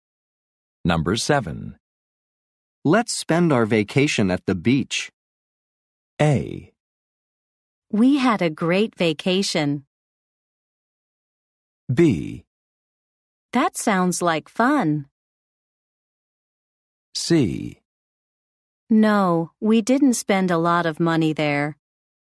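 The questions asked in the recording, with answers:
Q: Let's spend our vacation at the beach.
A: B: That sounds like fun.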